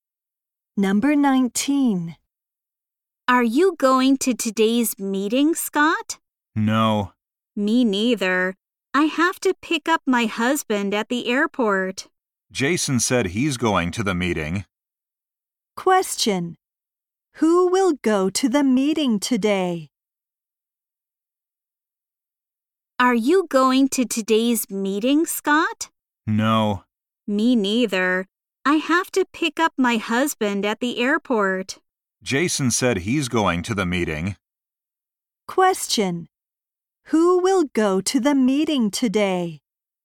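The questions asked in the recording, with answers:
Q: Who will go to the meeting today?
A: Jason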